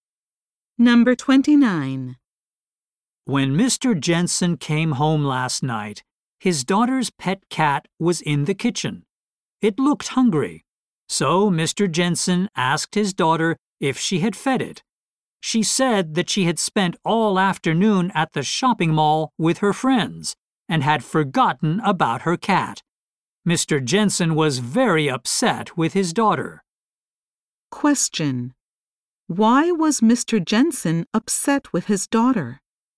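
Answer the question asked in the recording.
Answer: She forgot to feed her cat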